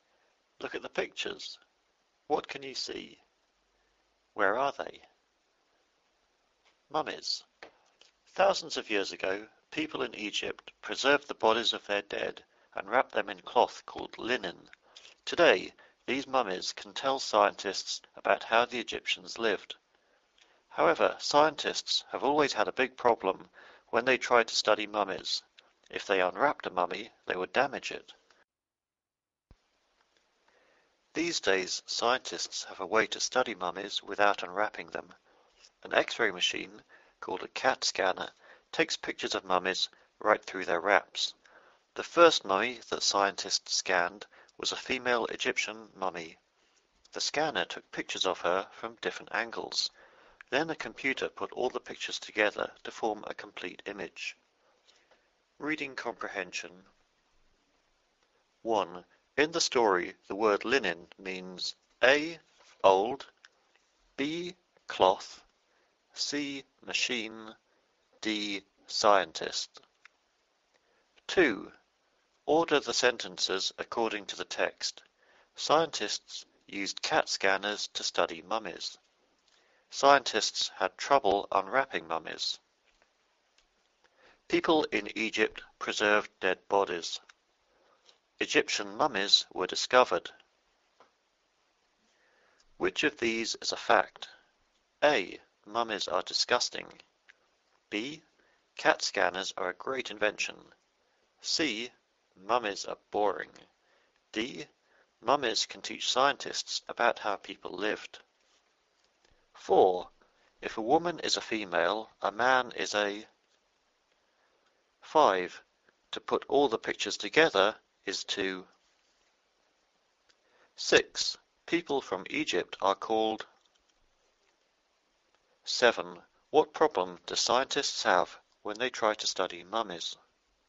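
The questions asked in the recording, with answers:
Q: In the story, the word linen means A.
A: B: Cloth

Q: Which of these is a fact?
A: D: Mummies can teach scientists about how people lived.

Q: People from Egypt are called.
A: Egyptians

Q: What problem do scientists have when they try to study mummies?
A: If they unwrapped a mummy, they would damage it.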